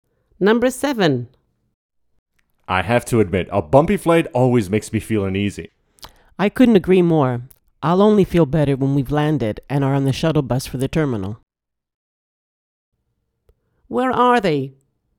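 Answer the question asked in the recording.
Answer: On a plane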